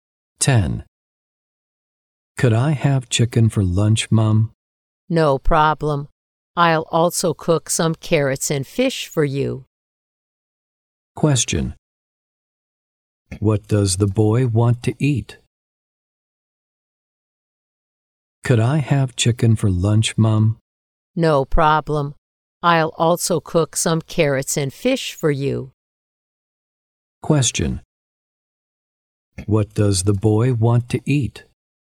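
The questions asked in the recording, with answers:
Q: What does the boy want to eat?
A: Chicken.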